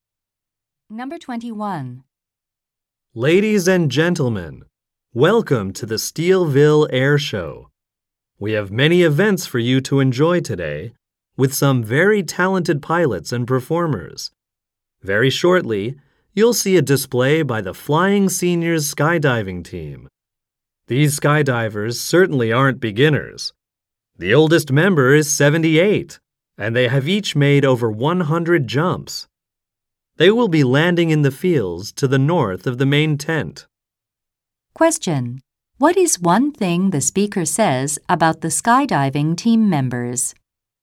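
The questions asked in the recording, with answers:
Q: What is one thing the speaker says about the skydiving team members?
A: They have each made over 100 jumps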